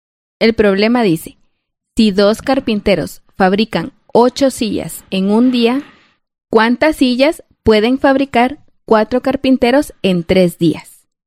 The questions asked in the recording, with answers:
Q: ¿cuántas sillas pueden fabricar 4 carpinteros en 3 días?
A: nuestra respuesta es que 4 carpinteros pueden fabricar 48 sillas en 3 días.